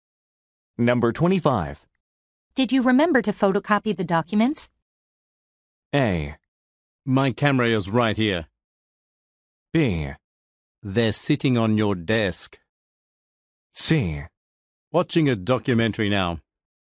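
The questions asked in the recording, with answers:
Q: Did you remember to photocopy the documents?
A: B: They're sitting on your desk.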